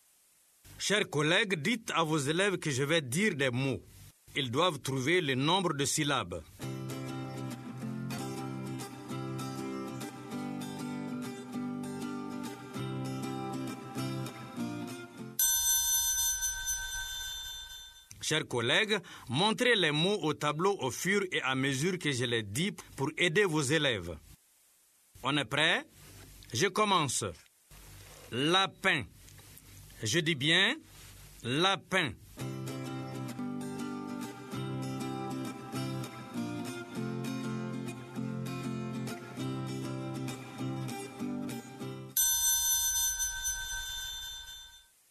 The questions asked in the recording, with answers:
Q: Lapin. Je dis bien lapin.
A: Monsieur, il y a deux syllabes.